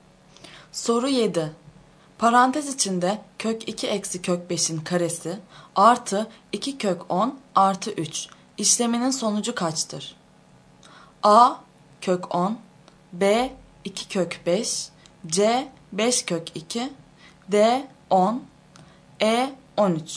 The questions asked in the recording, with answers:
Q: Parantez içinde kök 2 eksi kök 5'in karesi artı 2 kök 10 artı 3 işleminin sonucu kaçtır?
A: Doğru yanıt D şıkkı.